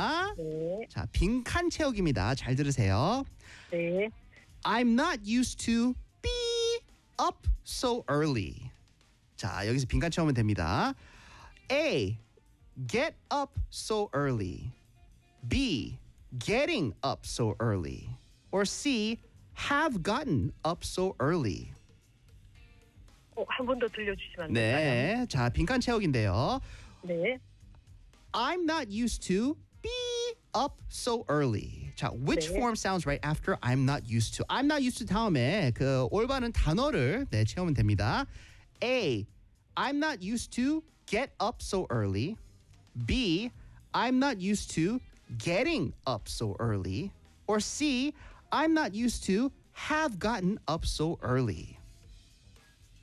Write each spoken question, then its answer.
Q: which 네. form sounds right after I'm not used to?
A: 아, B예요, B. I'm 와. not used to getting up so early.